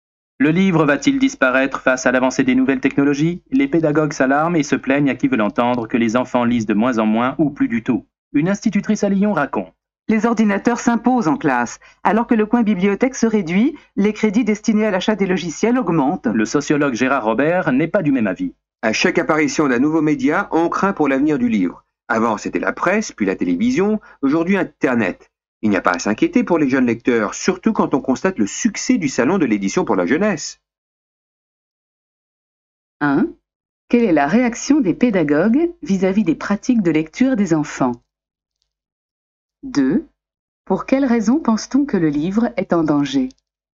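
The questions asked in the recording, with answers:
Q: Quelle est la réaction des pédagogues vis-à-vis des pratiques de lecture des enfants?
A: Ils s'alarment et se plaignent que les enfants lisent de moins en moins ou plus du tout.

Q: Pour quelles raisons pense-t-on que le livre est en danger?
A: À cause de l'avancée des nouvelles technologies : les ordinateurs s'imposent en classe et Internet apparaît.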